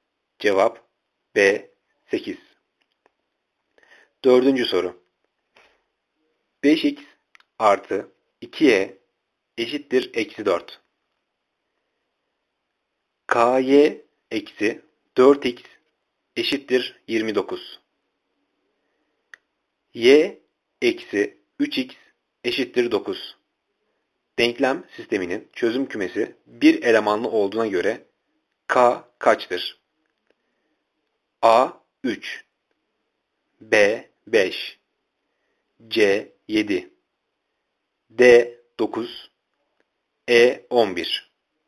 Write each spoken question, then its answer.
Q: Denklem sisteminin çözüm kümesi bir elemanlı olduğuna göre k kaçtır?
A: Cevap C 7.